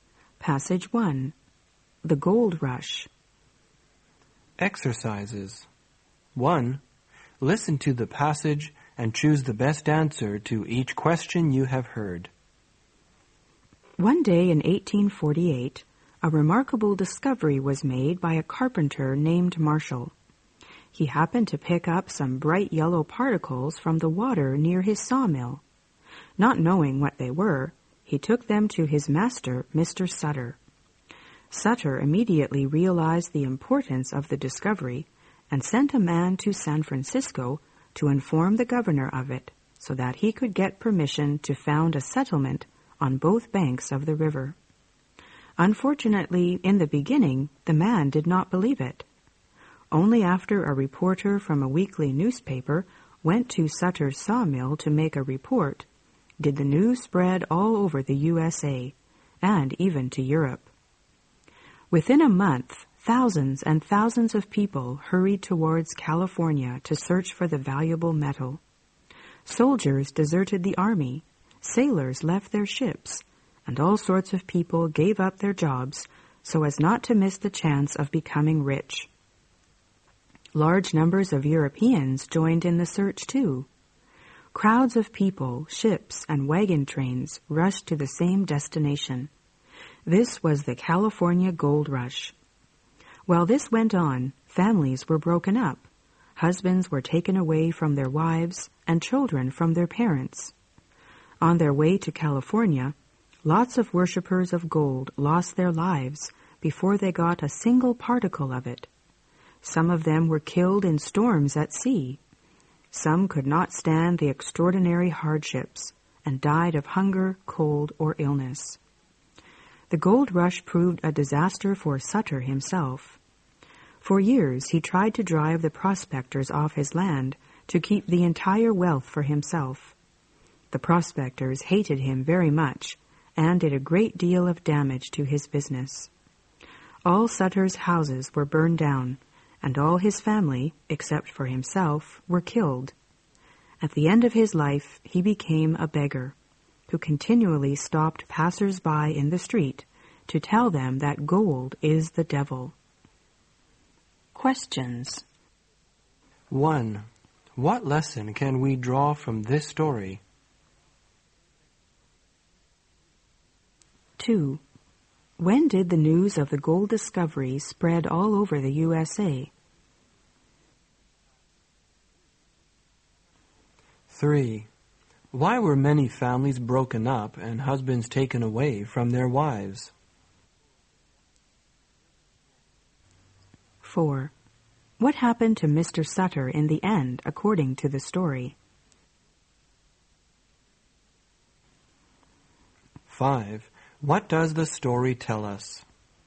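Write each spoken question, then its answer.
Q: When did the news of the gold discovery spread all over the USA?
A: After a reporter from a weekly newspaper went to Sutter's sawmill to make a report.

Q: Why were many families broken up and husbands taken away from their wives?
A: Because people rushed to California to search for gold.

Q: What happened to Mr. Sutter in the end, according to the story?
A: He lost his houses and family and became a beggar.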